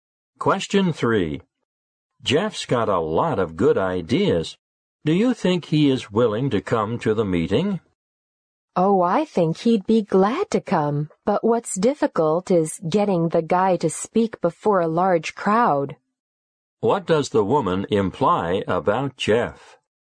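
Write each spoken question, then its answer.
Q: What does the woman imply about Jeff?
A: He finds it hard to speak before a large crowd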